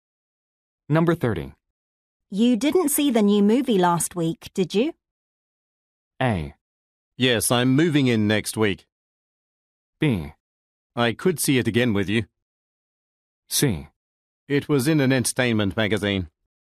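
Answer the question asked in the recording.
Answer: B: I could see it again with you.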